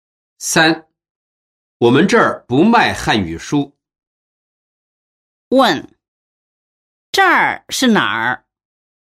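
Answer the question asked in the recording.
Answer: 书店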